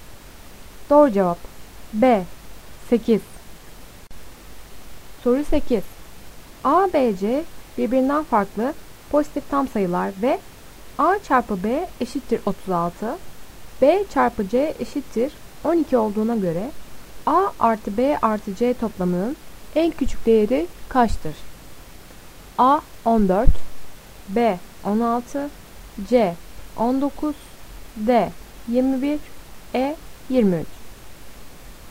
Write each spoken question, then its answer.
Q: A, B, C birbirinden farklı pozitif tam sayılar ve A çarpı B eşittir 36, B çarpı C eşittir 12 olduğuna göre A artı B artı C toplamının en küçük değeri kaçtır?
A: Doğru cevap B 16.